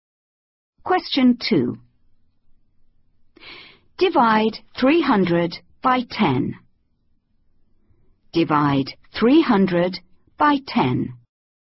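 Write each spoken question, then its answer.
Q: Divide 300 by 10.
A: 30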